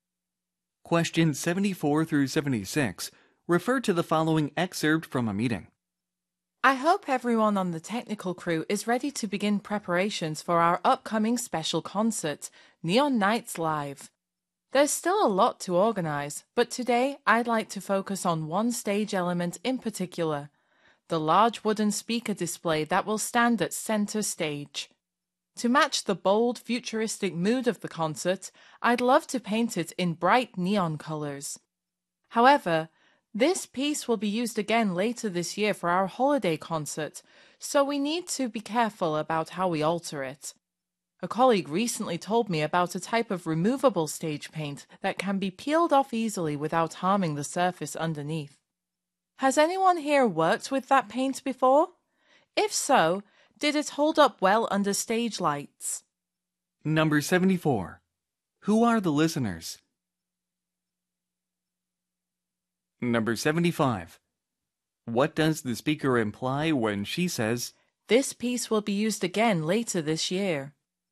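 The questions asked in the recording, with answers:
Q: Who are the listeners?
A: Technical crew members

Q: What does the speaker imply when she says,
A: The display should not be permanently altered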